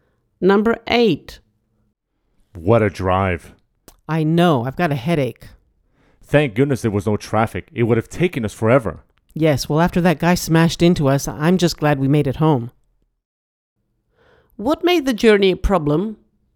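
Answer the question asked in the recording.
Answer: a car crashed into them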